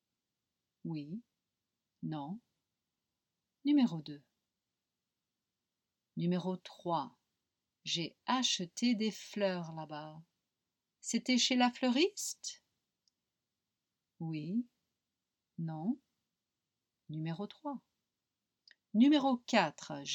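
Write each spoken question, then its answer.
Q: C'était chez la fleuriste?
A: Oui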